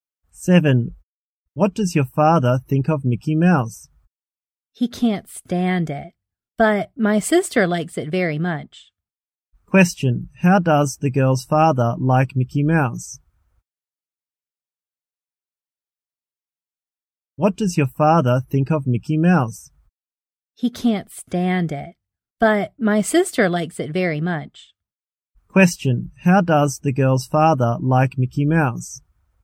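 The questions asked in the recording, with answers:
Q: How does the girl's father like Mickey Mouse?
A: He can't stand it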